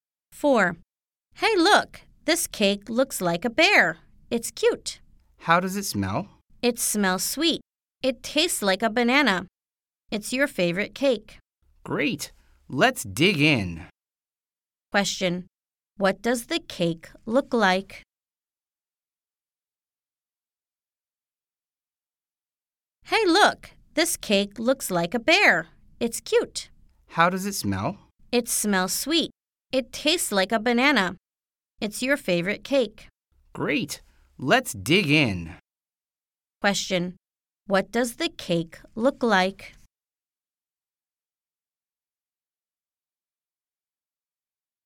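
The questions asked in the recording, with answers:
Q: Question. What does the cake look like?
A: A bear.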